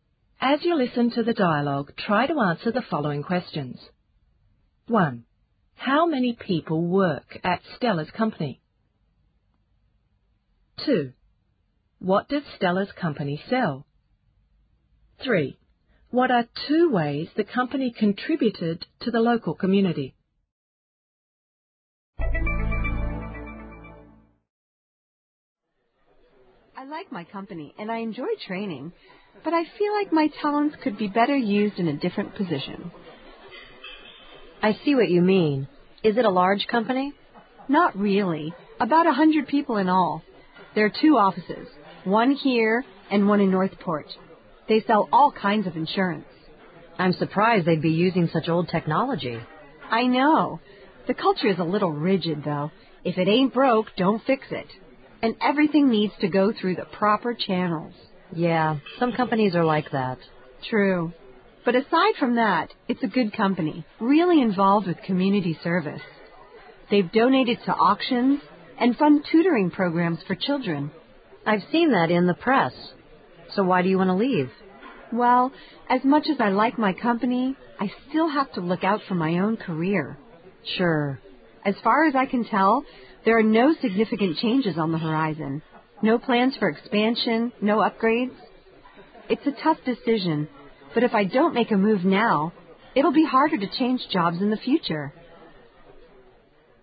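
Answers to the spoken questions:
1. About 100 people
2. All kinds of insurance
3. Donated to auctions and funds tutoring programs for children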